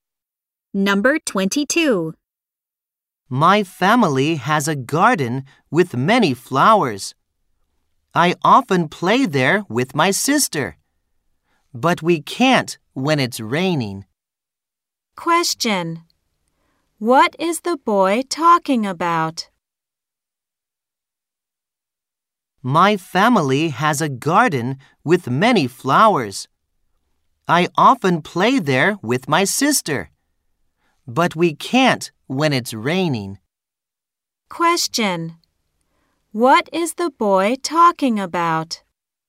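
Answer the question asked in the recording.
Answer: His family's garden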